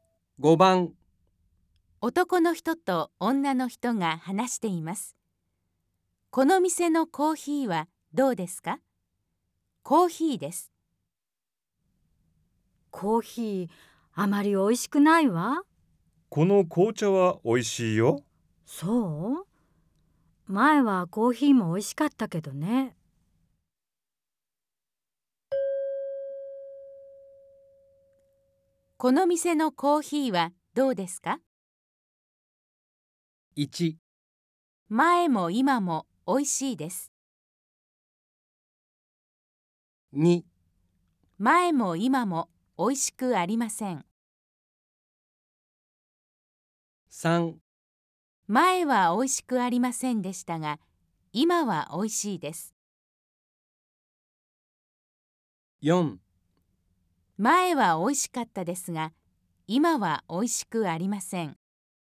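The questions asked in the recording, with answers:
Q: この店のコーヒーはどうですか?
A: 4: 前はおいしかったですが、今はおいしくありません。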